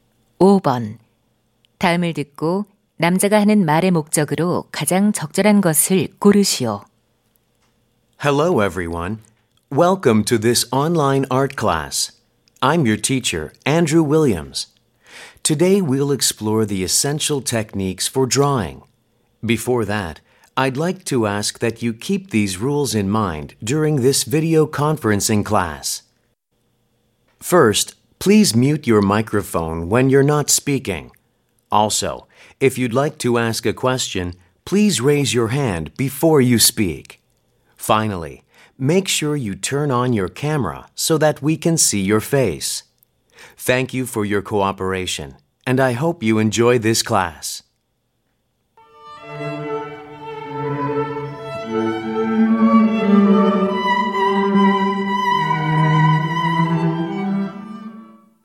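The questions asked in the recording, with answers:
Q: 다음을 듣고 남자가 하는 말의 목적으로 가장 적절한 것을 고르시오.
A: 화상 수업 규칙 안내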